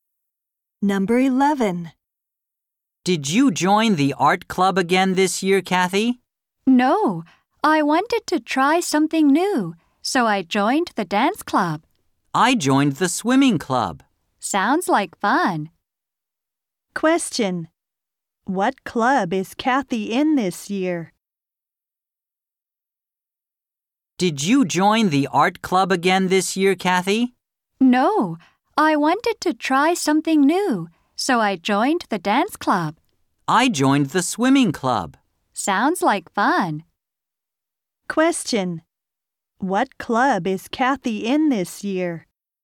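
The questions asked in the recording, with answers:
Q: What club is Kathy in this year?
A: The dance club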